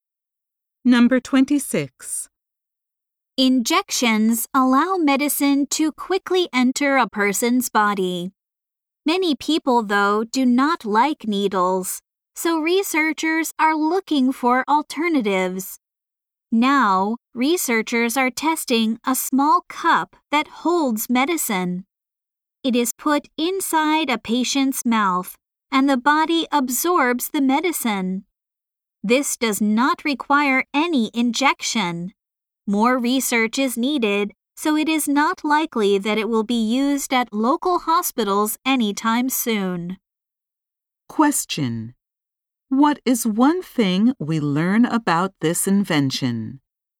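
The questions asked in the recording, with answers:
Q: What is one thing we learn about this invention?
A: It delivers medicine without an injection, but needs more research.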